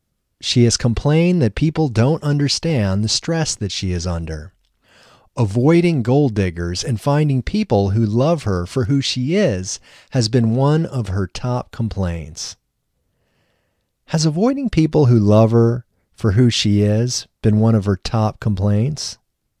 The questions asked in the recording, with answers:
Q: Has avoiding people who love her for who she is been one of her top complaints?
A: No, avoiding people who love her for who she is has not been one of her top complaints.